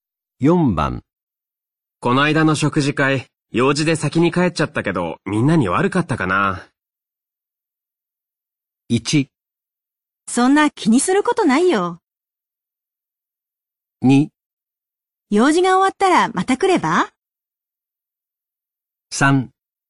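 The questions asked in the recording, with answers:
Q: この間の食事会、用事で先に帰っちゃったけど、みんなに悪かったかな。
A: 1: そんな気にすることないよ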